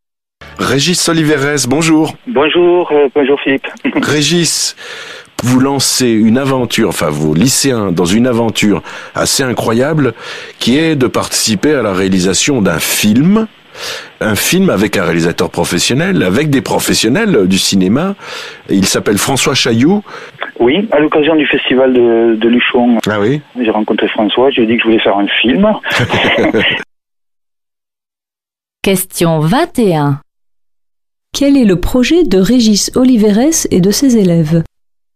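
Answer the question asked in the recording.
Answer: Participer à la réalisation d'un film avec des professionnels du cinéma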